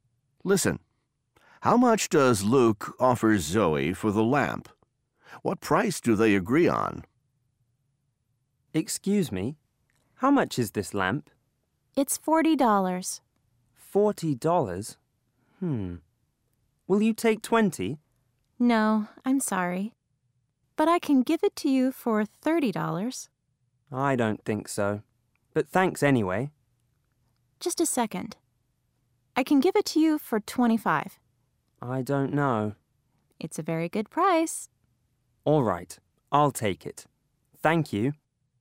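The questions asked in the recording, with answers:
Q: How much does Luke offer Zoe for the lamp?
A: $20

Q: What price do they agree on?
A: $25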